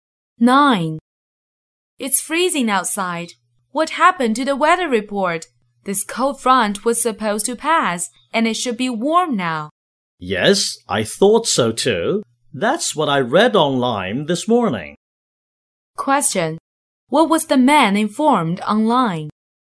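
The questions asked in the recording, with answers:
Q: What was the man informed online?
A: That the cold front would pass and it would be warm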